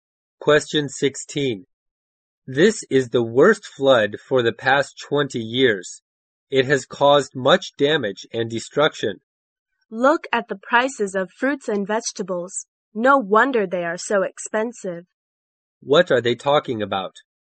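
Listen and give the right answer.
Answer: The flood and its effect on fruit and vegetable prices.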